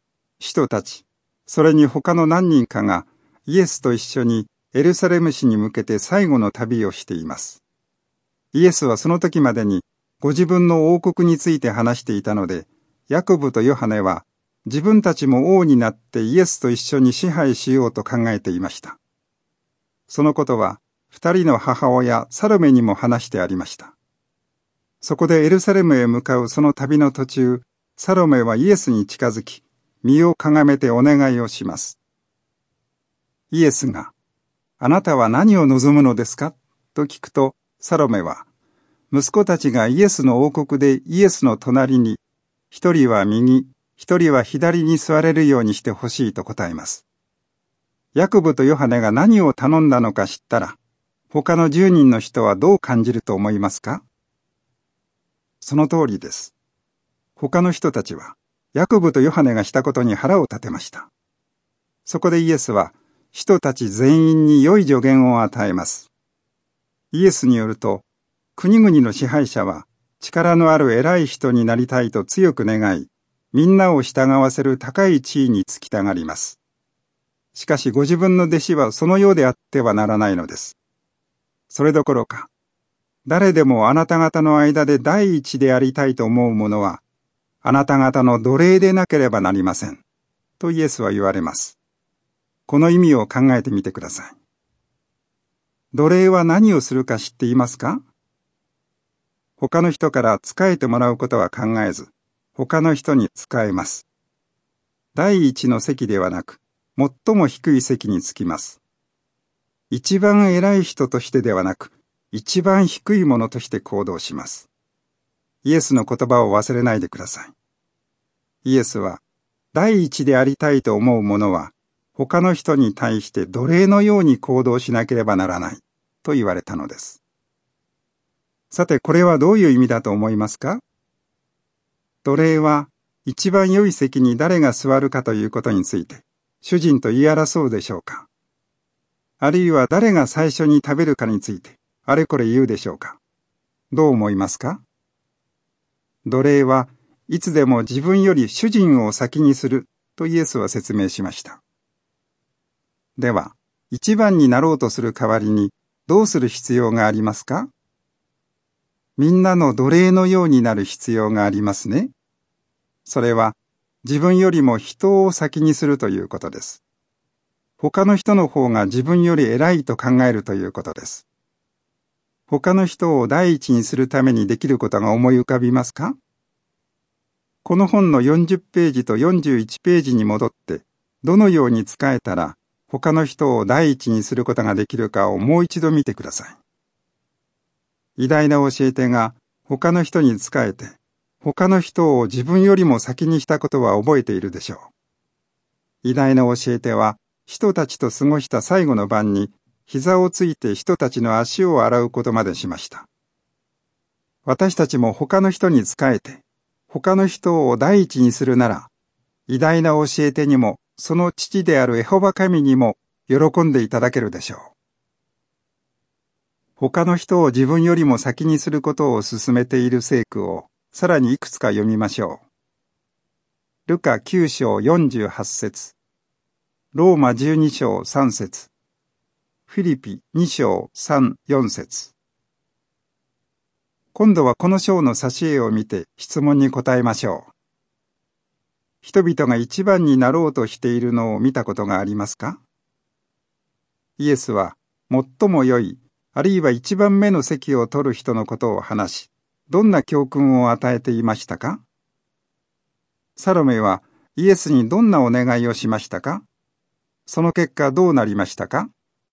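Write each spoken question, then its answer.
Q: サロメはイエスにどんなお願いをしましたか?その結果どうなりましたか?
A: 息子のヤコブとヨハネを、イエスの王国でイエスの右と左に座らせてほしいと頼んだ。その結果、他の使徒たちが腹を立てた。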